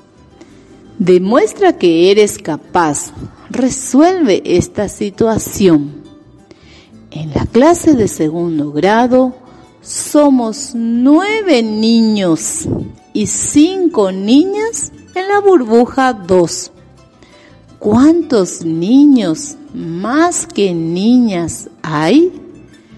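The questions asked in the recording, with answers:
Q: ¿cuántos niños más que niñas hay?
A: 4 niños más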